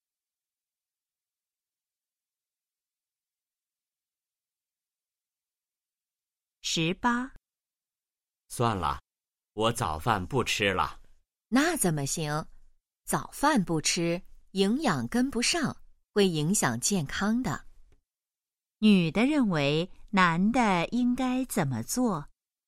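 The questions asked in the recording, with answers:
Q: 女的认为男的应该怎么做?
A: 吃早饭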